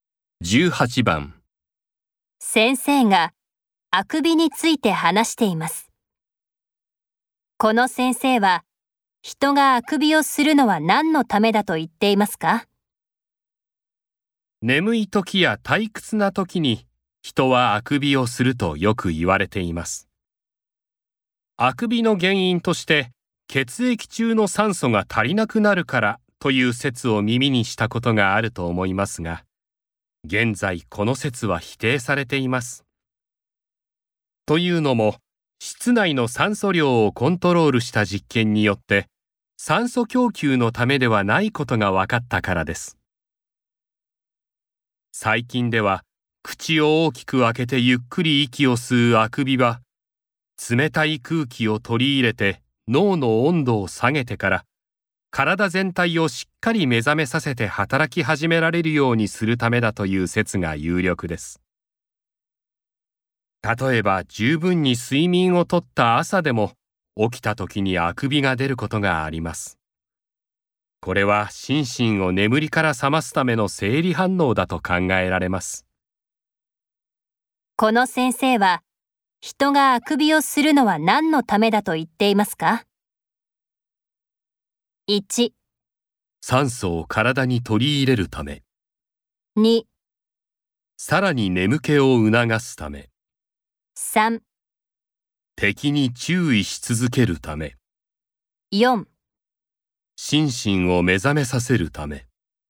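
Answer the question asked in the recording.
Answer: 4: 心身を目覚めさせるため。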